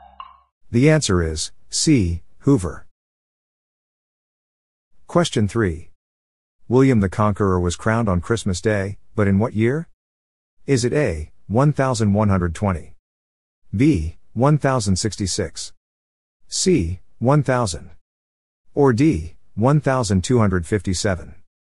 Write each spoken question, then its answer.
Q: William the Conqueror was crowned on Christmas Day, but in what year?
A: The answer is B, 1066.